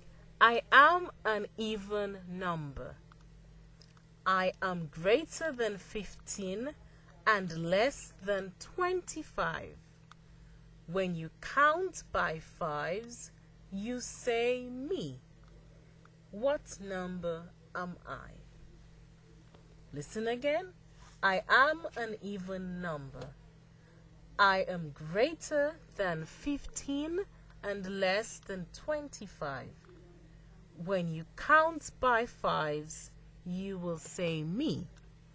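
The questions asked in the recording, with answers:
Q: What number am I?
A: 20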